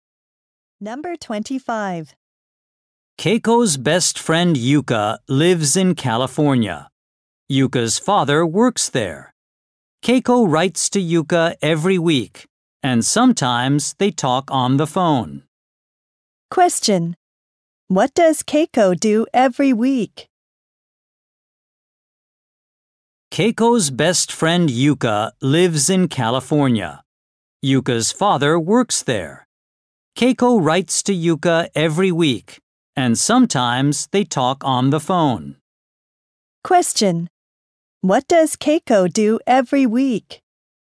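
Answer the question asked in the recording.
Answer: She writes to Yuka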